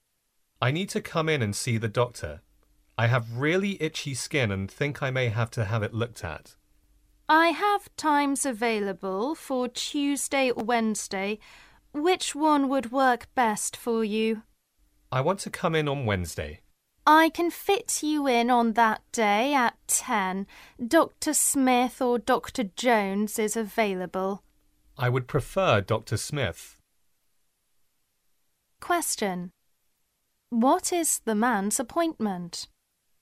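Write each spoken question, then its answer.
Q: What is the man's appointment?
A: Wednesday at 10 with Dr. Smith.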